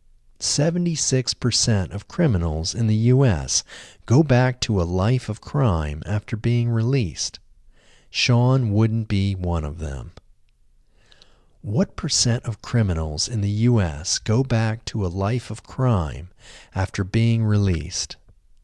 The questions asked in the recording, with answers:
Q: What percent of criminals in the U.S. go back to a life of crime after being released?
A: 76% of criminals in the U.S.